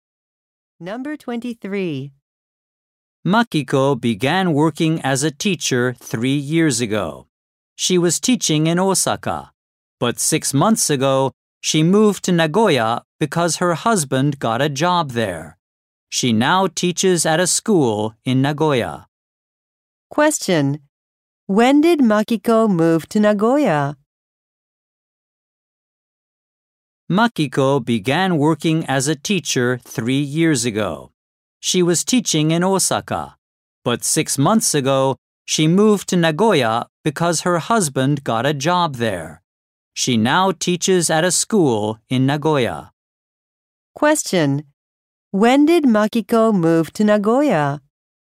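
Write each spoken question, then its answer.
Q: When did Makiko move to Nagoya?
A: 6 months ago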